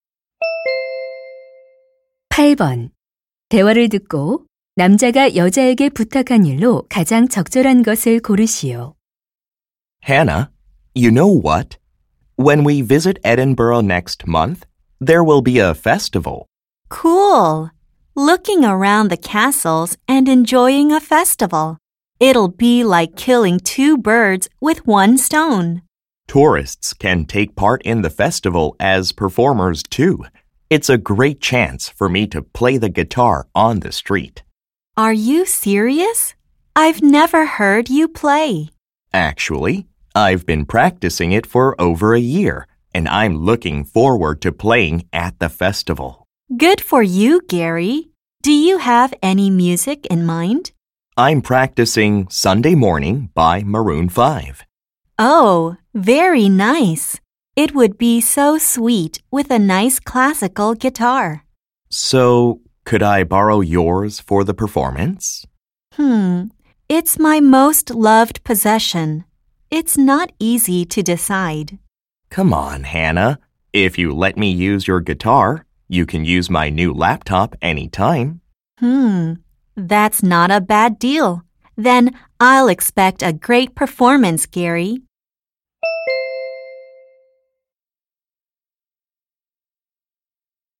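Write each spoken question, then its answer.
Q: 대화를 듣고 남자가 여자에게 부탁한 일로 가장 적절한 것을 고르시오.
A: 기타 빌려주기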